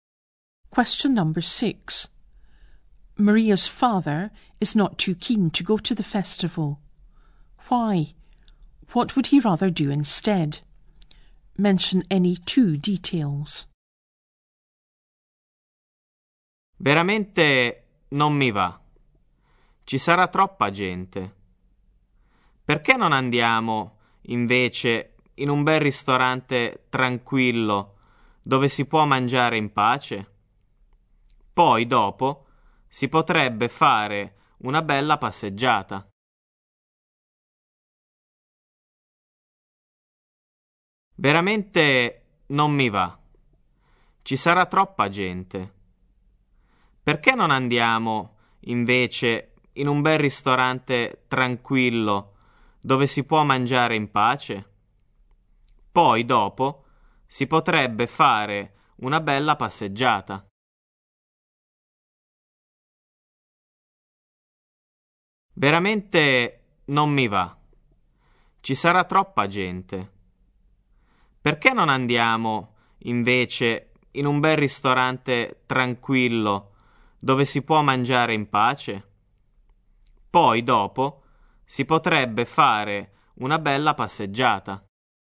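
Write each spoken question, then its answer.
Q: Why? What would he rather do instead?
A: There will be too many people; he'd rather go to a nice quiet restaurant to eat in peace, then go for a nice walk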